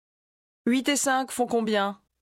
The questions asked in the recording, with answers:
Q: 8 et 5 font combien?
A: 13.